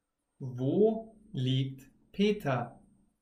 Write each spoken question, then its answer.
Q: Wo liegt Peter?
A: Im Bett. Peter liegt im Bett.